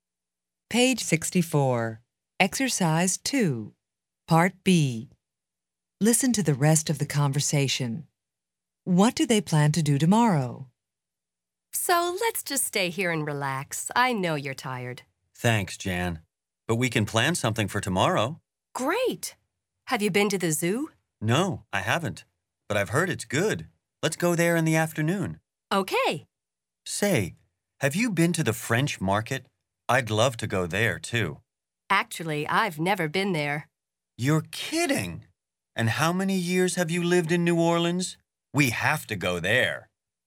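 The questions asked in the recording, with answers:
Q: What do they plan to do tomorrow?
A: Go to the zoo in the afternoon and visit the French market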